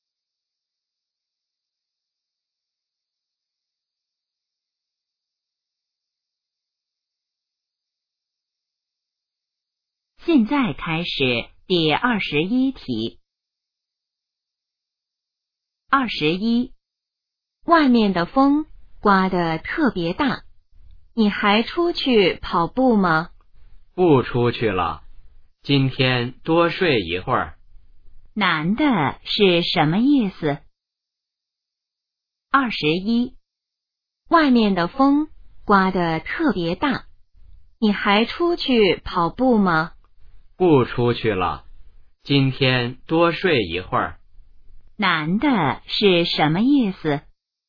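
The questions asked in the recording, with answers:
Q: 男的是什么意思?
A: 今天不出去跑步了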